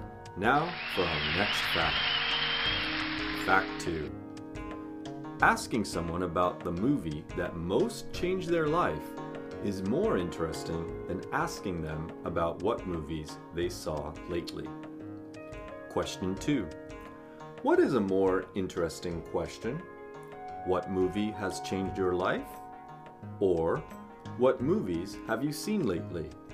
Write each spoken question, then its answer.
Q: What is a more interesting question?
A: a more interesting question is what movie has most changed your life?